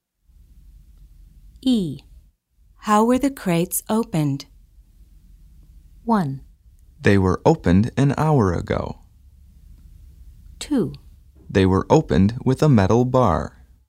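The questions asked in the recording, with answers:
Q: How were the crates opened?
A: 2: They were opened with a metal bar.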